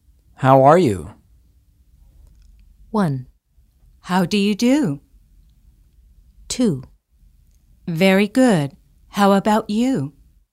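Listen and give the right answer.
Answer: 2: Very good. How about you?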